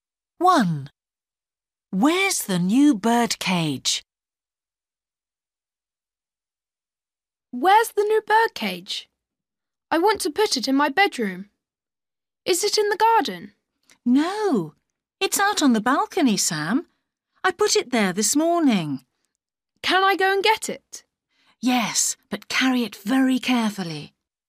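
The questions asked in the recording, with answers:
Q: Where's the new birdcage?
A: On the balcony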